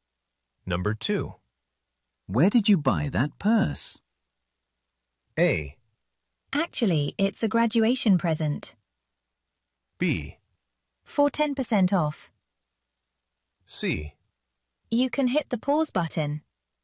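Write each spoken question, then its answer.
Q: Where did you buy that purse?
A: A: Actually, it's a graduation present.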